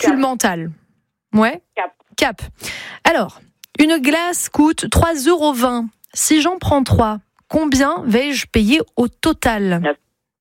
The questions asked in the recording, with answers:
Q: Si j'en prends 3, combien vais-je payer au total?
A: C'était 9,60.